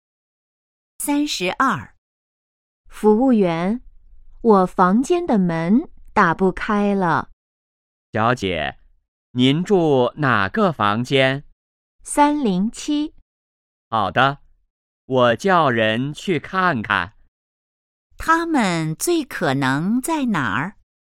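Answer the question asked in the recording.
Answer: 宾馆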